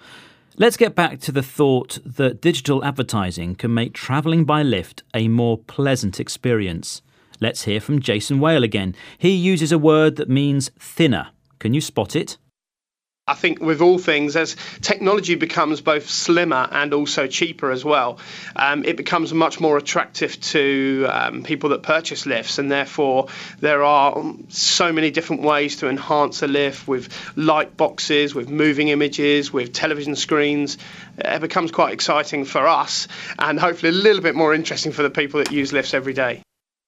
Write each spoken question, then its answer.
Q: He uses a word that means thinner. Can you spot it?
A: He said slimmer, which means thinner.